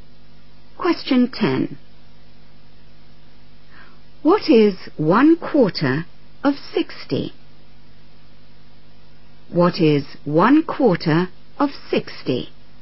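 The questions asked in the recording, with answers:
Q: What is 1/4 of 60?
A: 15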